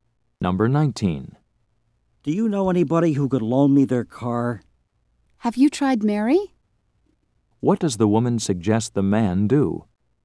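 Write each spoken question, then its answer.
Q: What does the woman suggest the man do?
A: Ask Mary to lend him her car.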